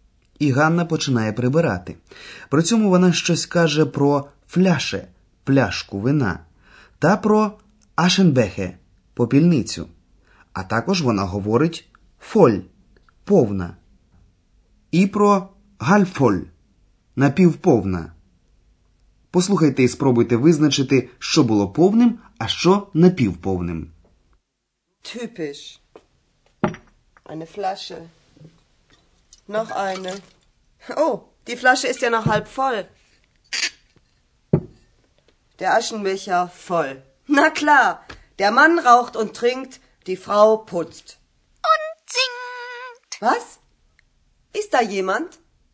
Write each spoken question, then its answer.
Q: Послухайте і спробуйте визначити, що було повним, а що напівповним.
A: Чи зрозуміли ви, що повною була попільниця, напівповною пляшка з вином?